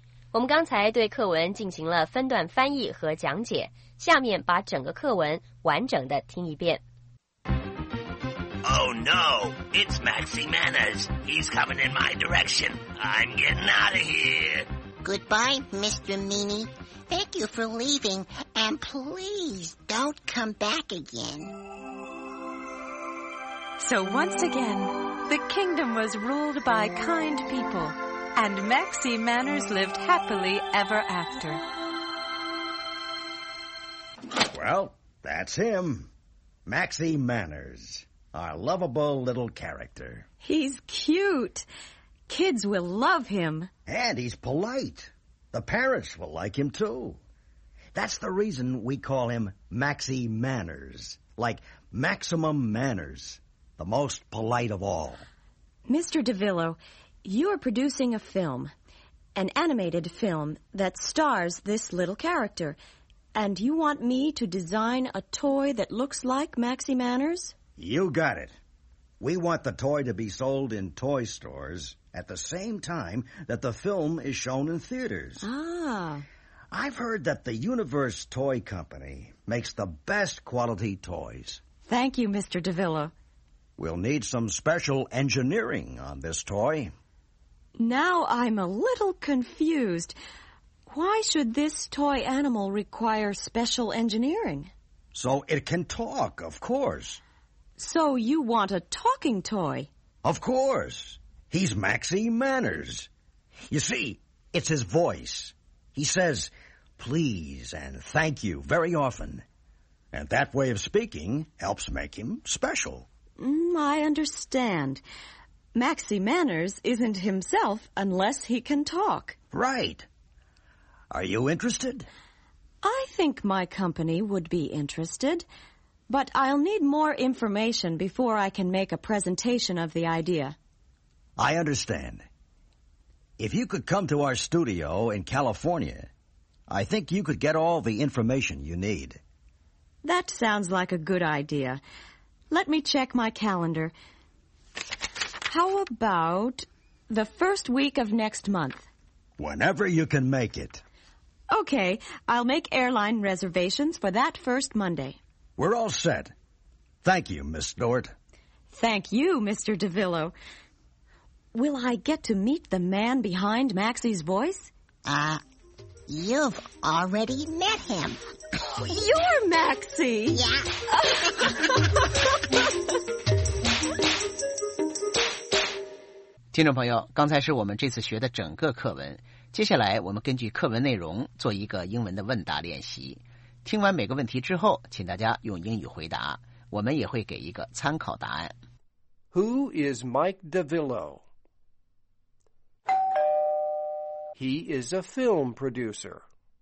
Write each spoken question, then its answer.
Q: Who is Mike DeVillo?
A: He is a film producer.